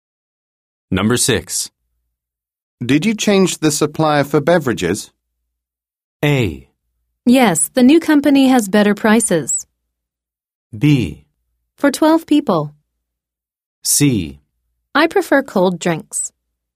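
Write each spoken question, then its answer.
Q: Did you change the supplier for beverages?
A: A: Yes, the new company has better prices.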